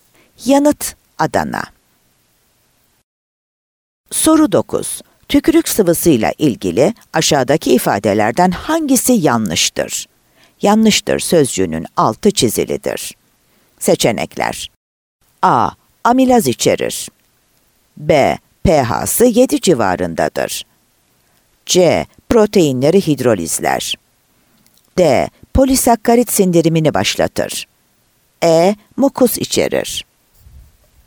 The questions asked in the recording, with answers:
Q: Tükürük sıvısıyla ilgili aşağıdaki ifadelerden hangisi yanlıştır?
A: Ceyhan